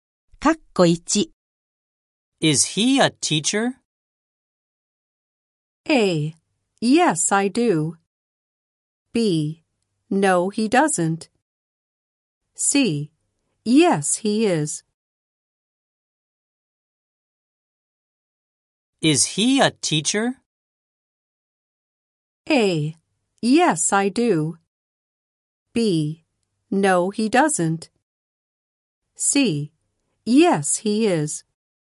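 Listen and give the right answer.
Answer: C: Yes, he is.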